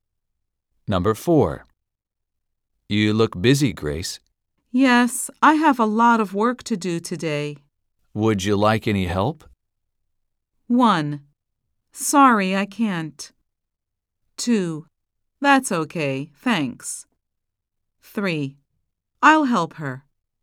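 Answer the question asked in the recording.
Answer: 2: That's okay, thanks.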